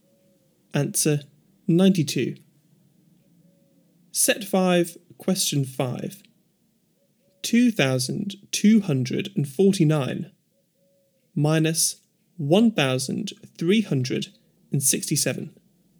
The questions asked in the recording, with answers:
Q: 2,249 minus 1,367.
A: Answer 882.